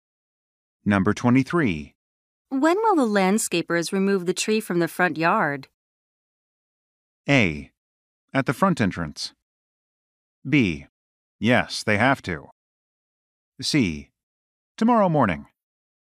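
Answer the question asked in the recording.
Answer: C: Tomorrow morning.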